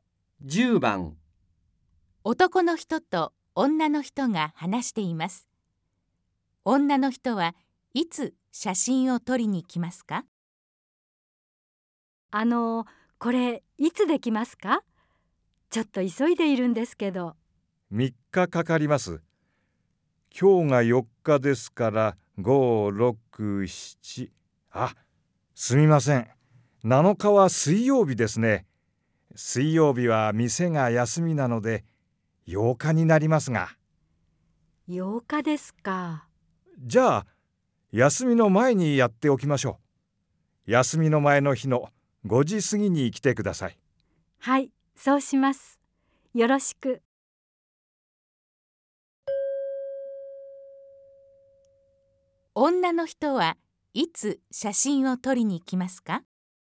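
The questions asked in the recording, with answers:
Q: 女の人はいつ写真を撮りに来ますか?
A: 6日の5時過ぎ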